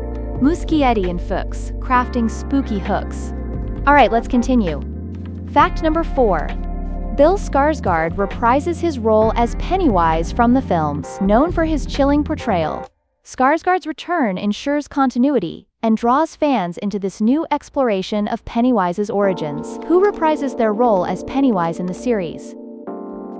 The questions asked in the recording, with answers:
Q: Who reprises their role as Pennywise in the series?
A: Bill Skarsgård.